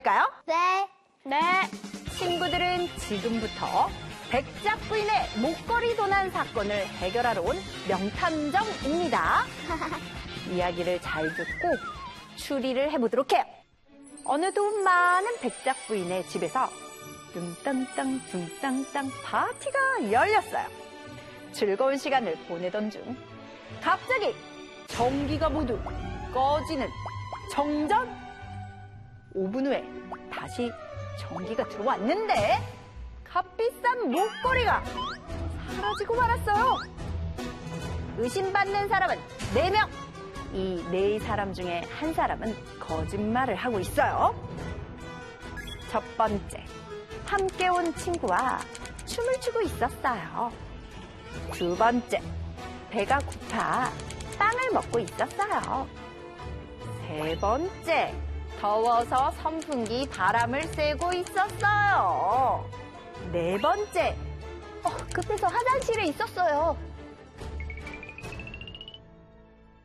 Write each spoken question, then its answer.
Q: 이 네 사람 중에 한 사람은 거짓말을 하고 있어요.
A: 거짓말인 이유는 정전이 되면 선풍기도 꺼지죠.